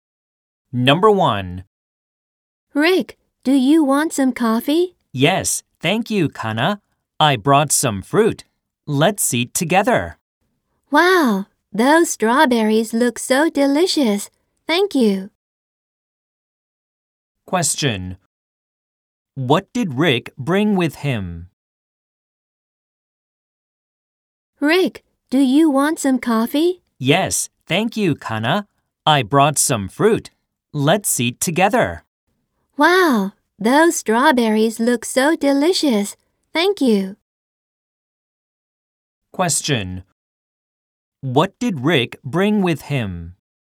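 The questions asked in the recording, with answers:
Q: What did Rick bring with him?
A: Some fruit (strawberries).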